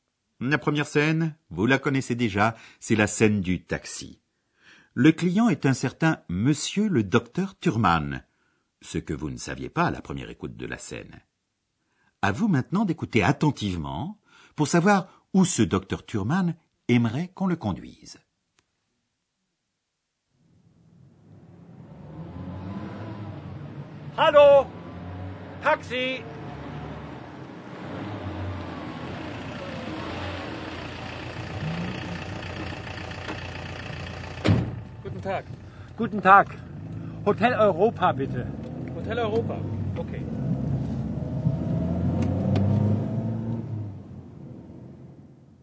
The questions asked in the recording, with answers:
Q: À vous maintenant d'écouter attentivement pour savoir où ce docteur Turman aimerait qu'on le conduise.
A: Ainsi donc, le docteur Thurman aimerait que le chauffeur de taxi le conduise à l'hôtel de l'Europe, Hôtel Europa.